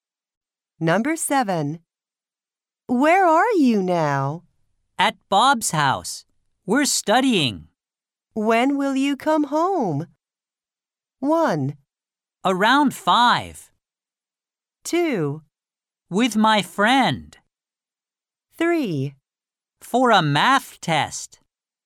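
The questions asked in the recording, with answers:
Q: When will you come home?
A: 1: Around 5.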